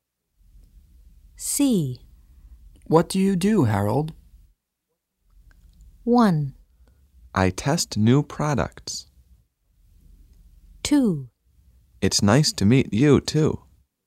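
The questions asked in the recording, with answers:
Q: What do you do, Harold?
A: 1: I test new products.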